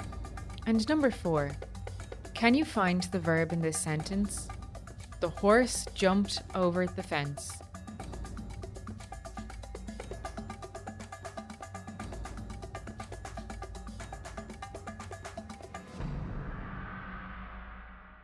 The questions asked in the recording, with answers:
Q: Can you find the verb in this sentence?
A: The verb is jumped.